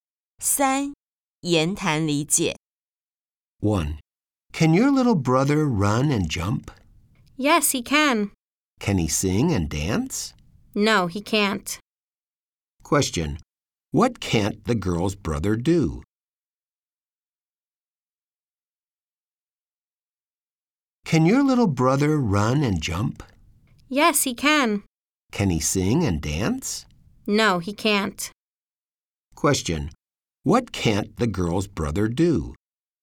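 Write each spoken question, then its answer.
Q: What can't the girl's brother do?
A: Sing and dance.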